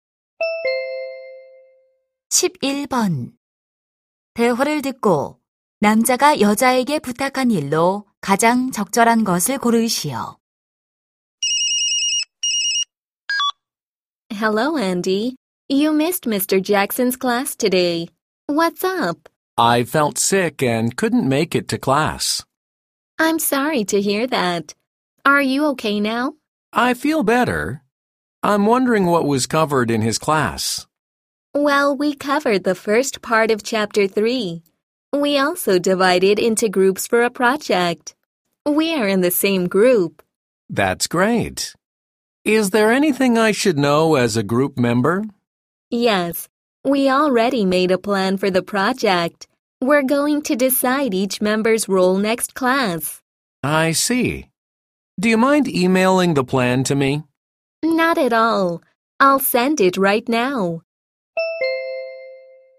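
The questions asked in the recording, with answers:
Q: 대화를 듣고 남자가 여자에게 부탁한 일로 가장 적절한 것을 고르시오.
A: 프로젝트 계획을 이메일로 보내 주기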